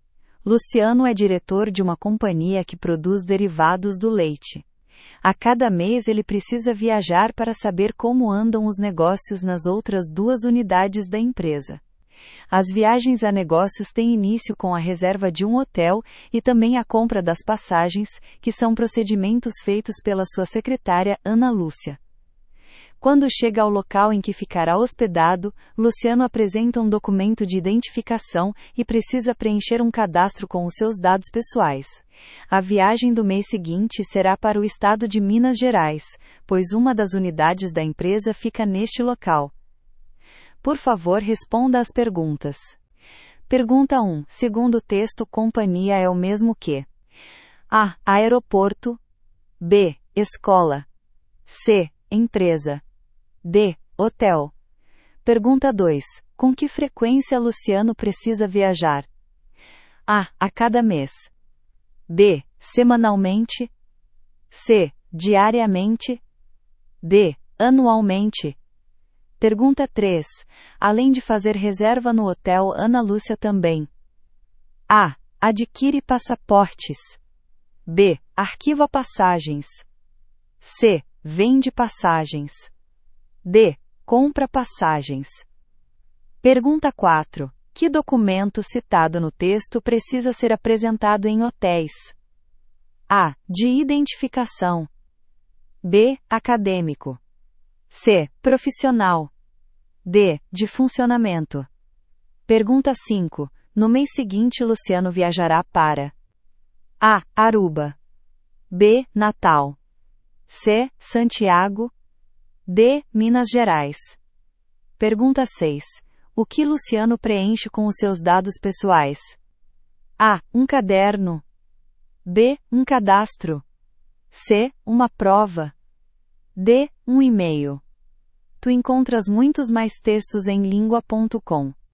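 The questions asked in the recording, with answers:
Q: Segundo texto, companhia é o mesmo que?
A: C: Empresa

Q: Com que frequência Luciano precisa viajar?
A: A: A cada mês

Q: Além de fazer reserva no hotel, Ana Lúcia também.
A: D: Compra passagens

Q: Que documento citado no texto precisa ser apresentado em hotéis?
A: A: De identificação

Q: No mês seguinte, Luciano viajará para A.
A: D: Minas Gerais

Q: O que Luciano preenche com os seus dados pessoais?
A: B: Um cadastro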